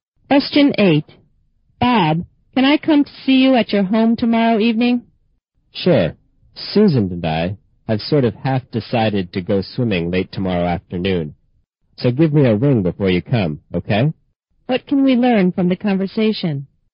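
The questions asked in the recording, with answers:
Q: What can we learn from the conversation?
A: Bob may go swimming, so the speaker should phone before visiting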